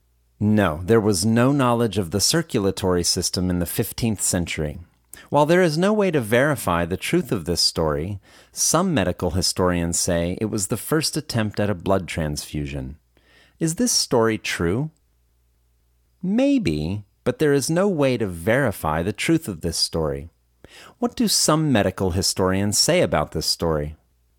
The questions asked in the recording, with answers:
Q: What do some medical historians say about this story?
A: Some medical historians say it was the first attempt at a blood transfusion.